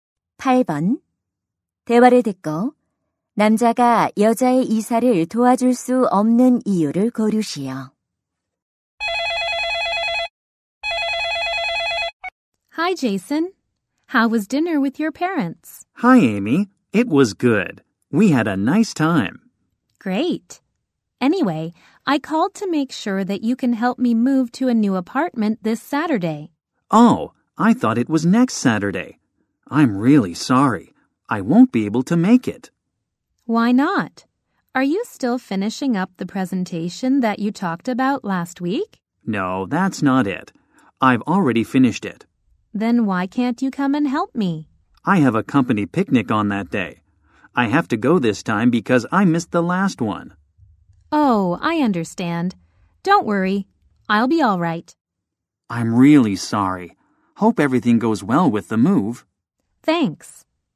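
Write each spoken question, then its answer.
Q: 대화를 듣고 남자가 여자의 이사를 도와줄 수 없는 이유를 고르시오.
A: 회사 야유회에 가야 해서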